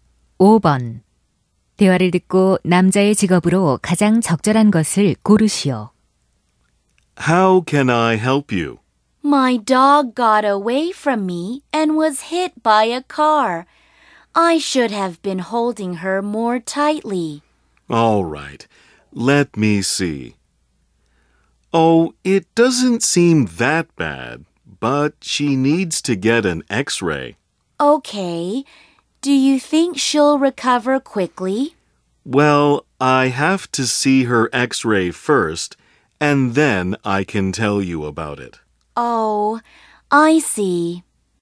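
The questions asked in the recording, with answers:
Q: 대화를 듣고 남자의 직업으로 가장 적절한 것을 고르시오.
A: 수의사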